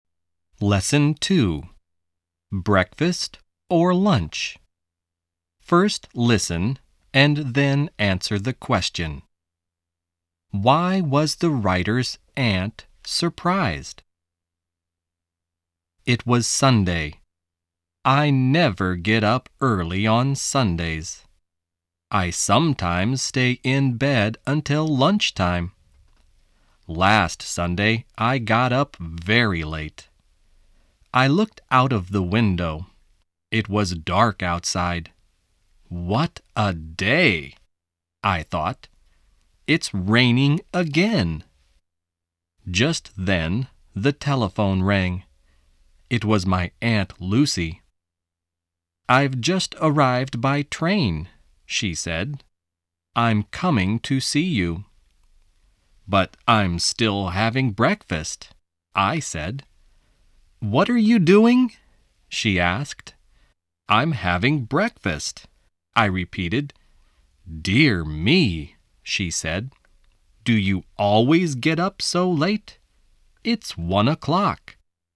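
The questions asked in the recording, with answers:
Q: Why was the writer's aunt surprised?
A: Because the writer was still having breakfast at 1 o'clock.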